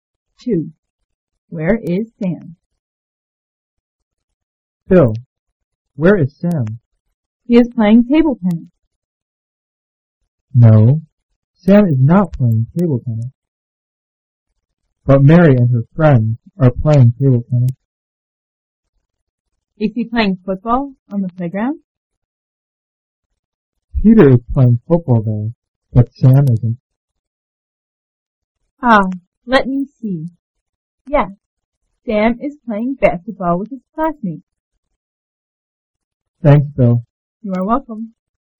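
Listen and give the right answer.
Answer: He is playing basketball with his classmates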